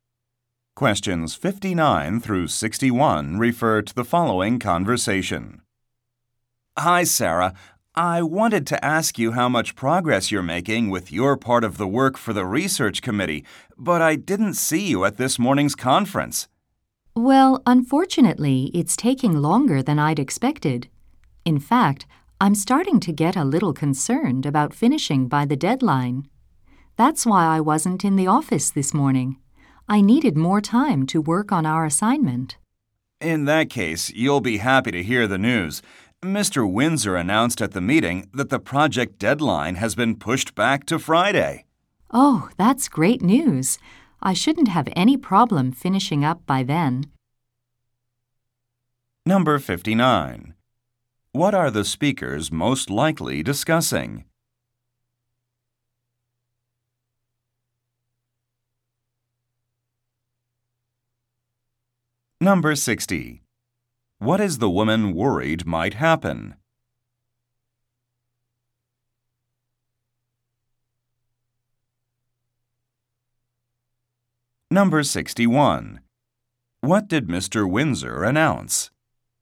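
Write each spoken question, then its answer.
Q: What are the speakers most likely discussing?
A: A research committee project

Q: What is the woman worried might happen?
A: She might miss the deadline

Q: What did Mr. Windsor announce?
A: The deadline was pushed back to Friday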